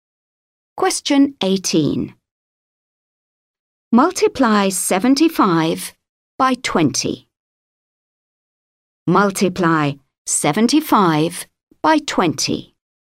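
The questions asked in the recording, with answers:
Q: Multiply 75 by 20.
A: 1500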